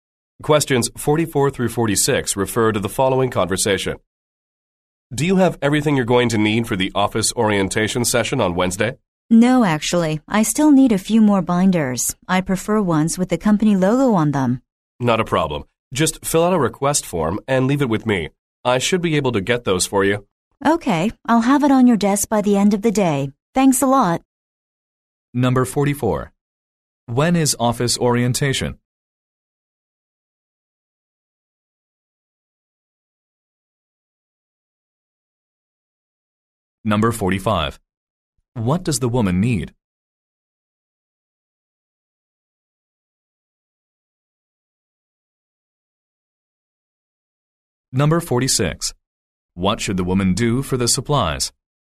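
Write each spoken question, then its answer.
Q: When is office orientation?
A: Wednesday

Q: What does the woman need?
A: More binders with the company logo

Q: What should the woman do for the supplies?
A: Fill out a request form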